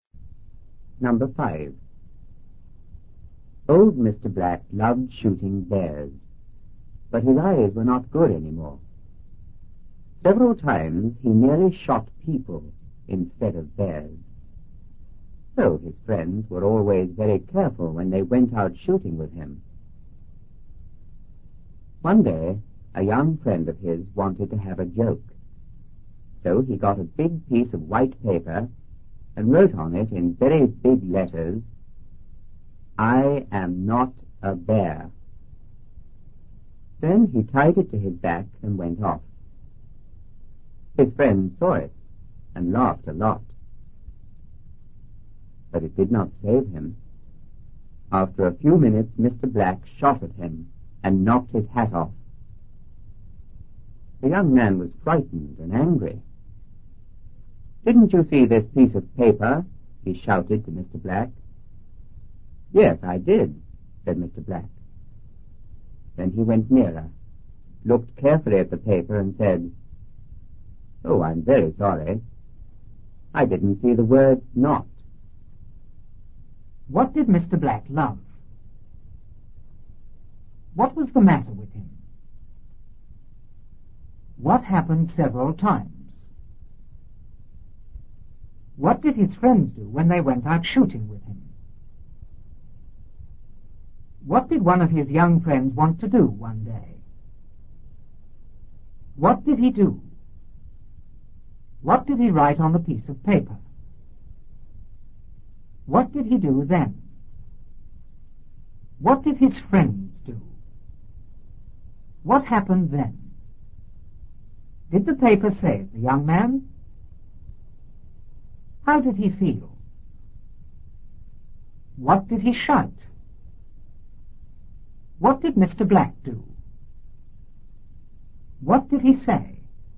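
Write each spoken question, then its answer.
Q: What did Mr. Black love?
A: Shooting bears

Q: What was the matter with him?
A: His eyes were not good anymore

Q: What happened several times?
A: He nearly shot people instead of bears

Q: What did his friends do when they went out shooting with him?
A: They were always very careful

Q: What did one of his young friends want to do one day?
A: Have a joke

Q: What did he do?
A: He got a big piece of white paper and wrote on it

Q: What did he write on the piece of paper?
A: "I am not a bear."

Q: What did he do then?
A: Tied it to his back and went off

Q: What did his friends do?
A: They saw it and laughed a lot

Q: What happened then?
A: Mr. Black shot at him and knocked his hat off

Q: Did the paper save the young man?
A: No

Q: How did he feel?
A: Frightened and angry

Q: What did he shout?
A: "Didn't you see this piece of paper?"

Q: What did Mr. 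Black do?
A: He went nearer and looked carefully at the paper

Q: What did he say?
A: "Oh, I'm very sorry. I didn't see the word not."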